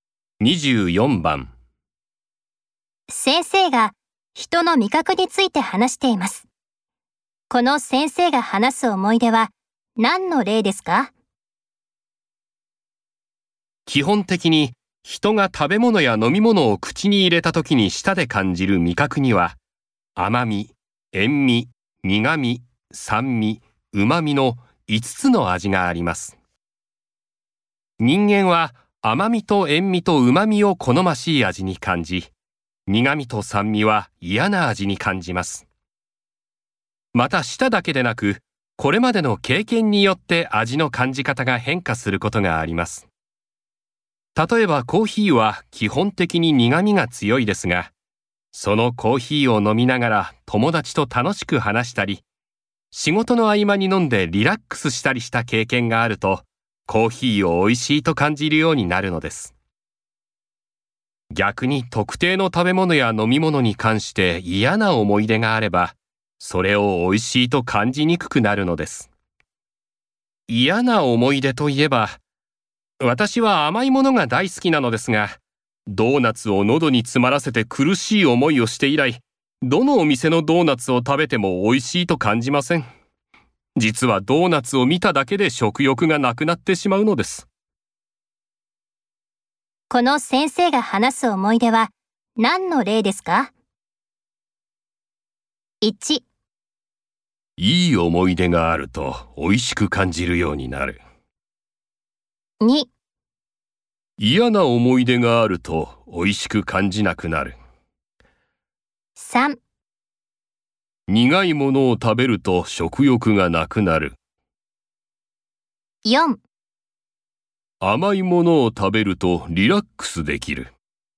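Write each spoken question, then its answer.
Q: この先生が話す思い出は何の例ですか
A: 2: 嫌な思い出があると美味しく感じなくなる。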